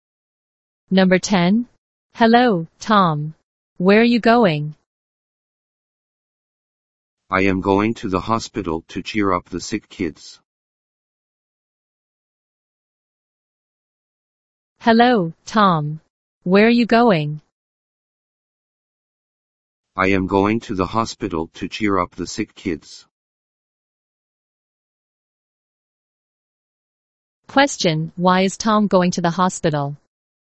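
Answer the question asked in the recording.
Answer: To cheer up the sick kids.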